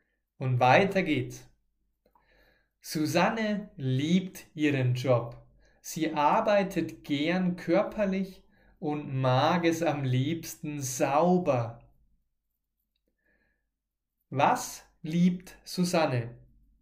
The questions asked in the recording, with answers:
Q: Was liebt Susanne?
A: Ihren Job. Susanne liebt ihren Job, ihre Arbeit.